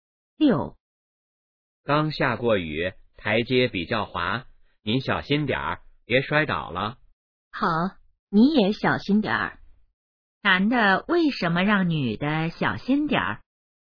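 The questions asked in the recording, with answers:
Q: 男的为什么让女的小心点儿?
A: 台阶比较滑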